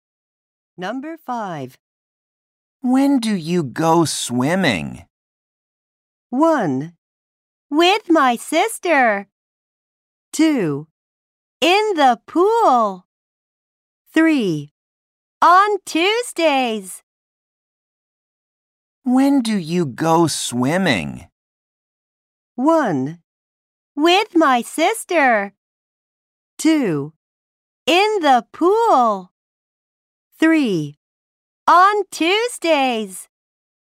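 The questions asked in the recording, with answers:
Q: When do you go swimming?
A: 3: On Tuesdays.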